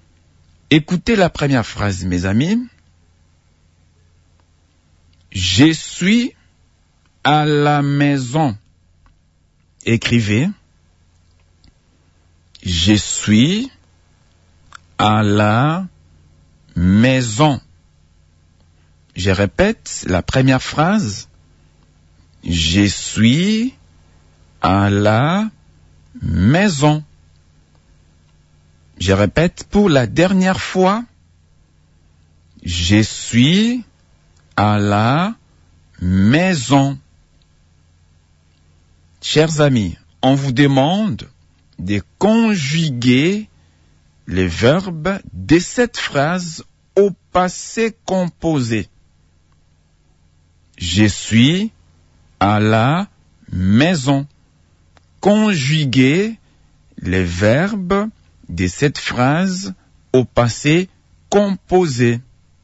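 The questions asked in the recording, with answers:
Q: Je suis à la maison. Conjuguez les verbes de cette phrase au passé composé.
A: J'ai été à la maison.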